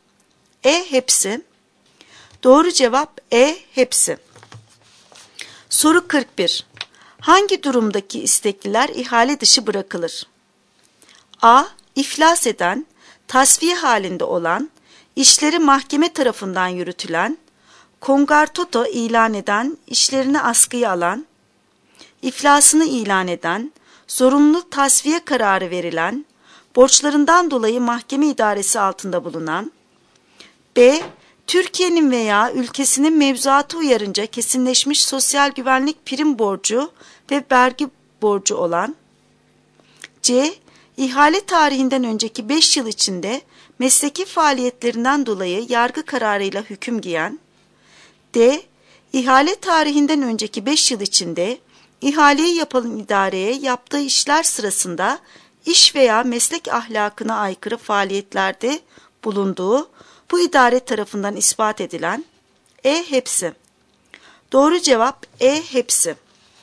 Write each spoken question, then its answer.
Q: Hangi durumdaki istekliler ihale dışı bırakılır?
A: Doğru cevap E. Hepsi.